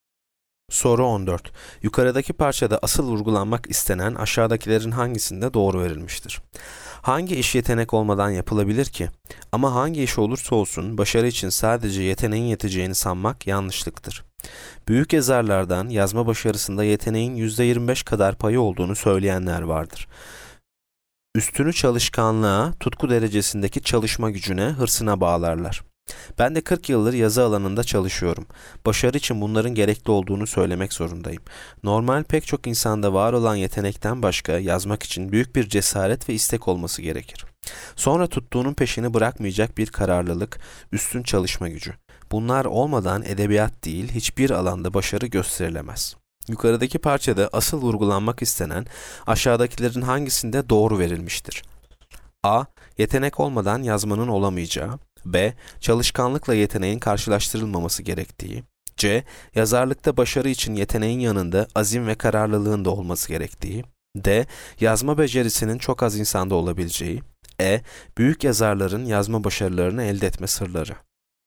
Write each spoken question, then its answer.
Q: Yukarıdaki parçada asıl vurgulanmak istenen aşağıdakilerin hangisinde doğru verilmiştir?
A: Yanıt C. Yazarlıkta başarı için yeteneğin yanında azim ve kararlılığın da olması gerektiği.